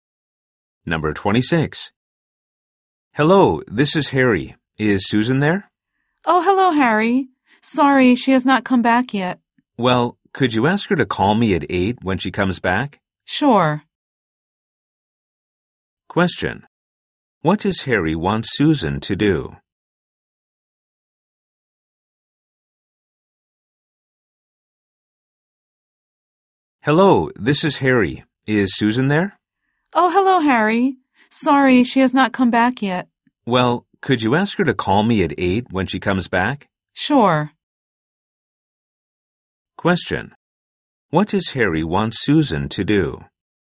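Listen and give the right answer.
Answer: Call him at 8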